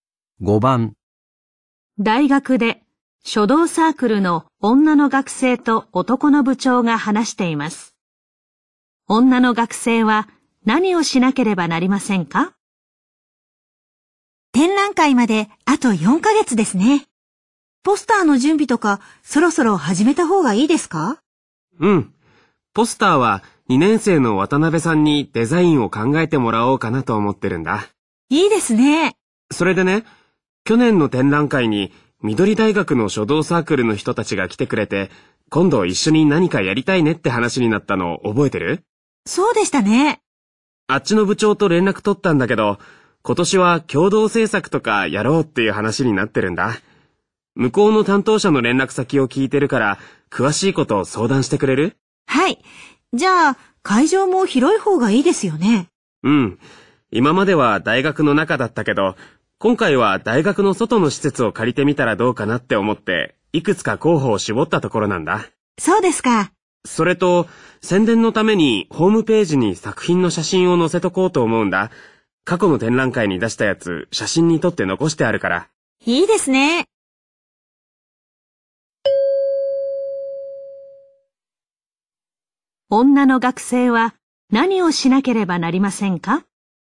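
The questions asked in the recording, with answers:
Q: 女の学生は何をしなければなりませんか?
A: 緑大学の担当者に連絡して共同制作について相談する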